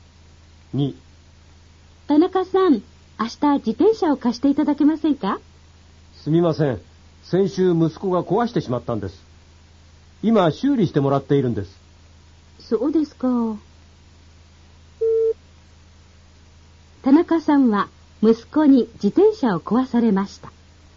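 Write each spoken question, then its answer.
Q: 田中さんは息子に自転車を壊されました。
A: 正しい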